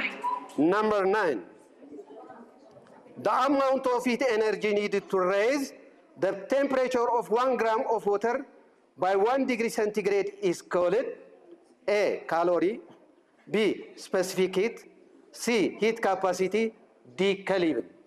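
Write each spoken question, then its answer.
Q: The amount of heat energy needed to raise the temperature of 1 gram of water by 1 degree centigrade is called A, calorie, B, specific heat, C, heat capacity, D, Kelvin.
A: A: calorie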